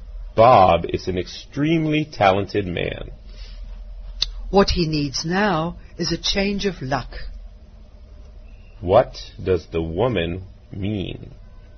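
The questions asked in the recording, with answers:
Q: What does the woman mean?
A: Bob is talented but has had bad luck.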